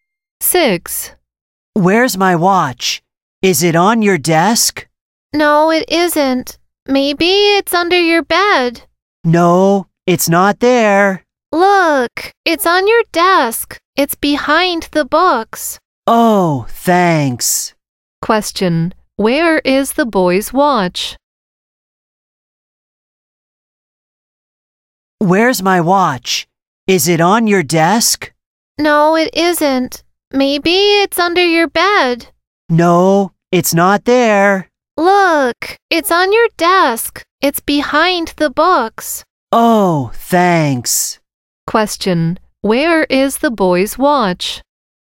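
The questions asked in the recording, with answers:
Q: Where is the boy's watch?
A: On his desk, behind the books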